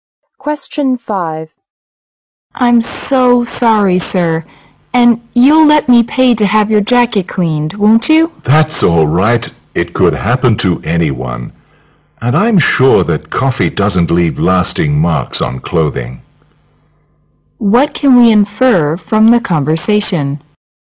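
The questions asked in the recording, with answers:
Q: What can we infer from the conversation?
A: The woman spilled coffee on the man's jacket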